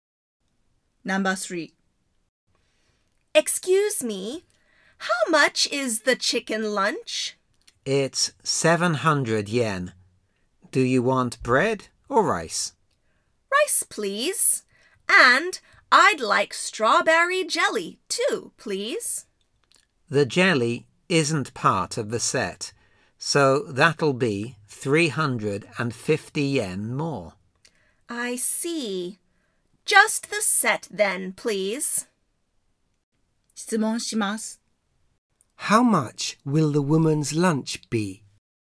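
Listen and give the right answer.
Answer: 700 yen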